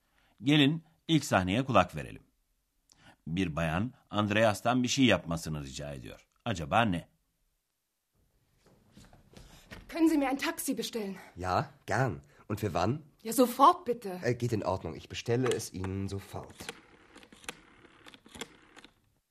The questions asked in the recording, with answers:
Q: Acaba ne?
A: Bir bayan Andreas'a bir taksi çağırıp çağıramayacağını soruyordu.